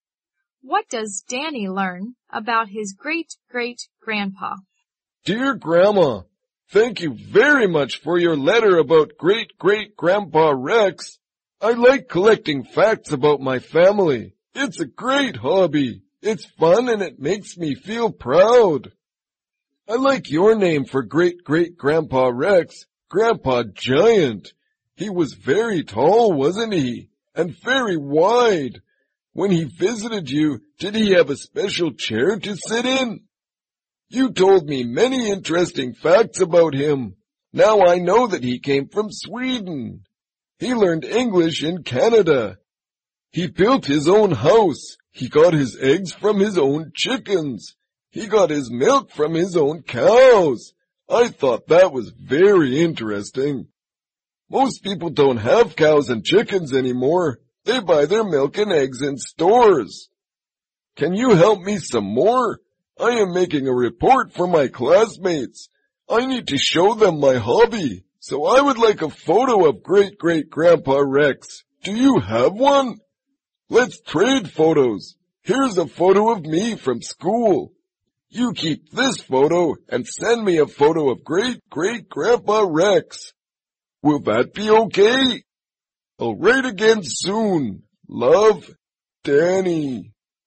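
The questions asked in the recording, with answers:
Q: What does Danny learn about his great-great-grandpa?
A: He came from Sweden, learned English in Canada, built his own house, and got his eggs and milk from his own chickens and cows.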